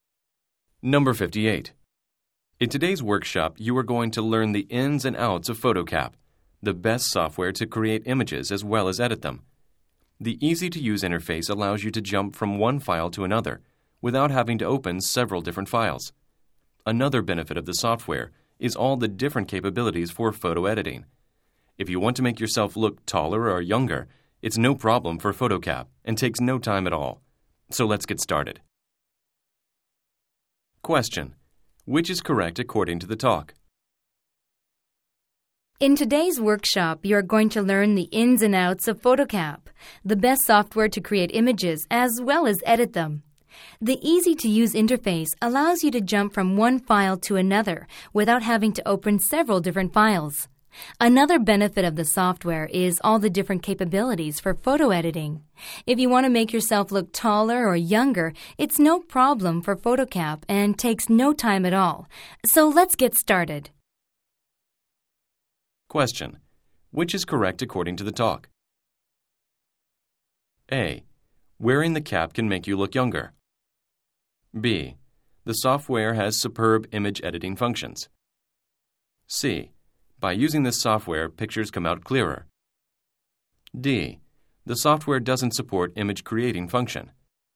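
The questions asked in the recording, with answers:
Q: which is correct according to the talk?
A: B: The software has superb image editing functions.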